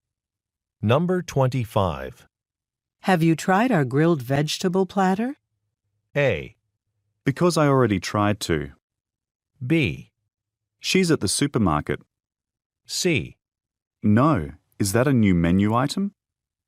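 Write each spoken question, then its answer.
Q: Have you tried our grilled vegetable platter?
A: C: No, is that a new menu item?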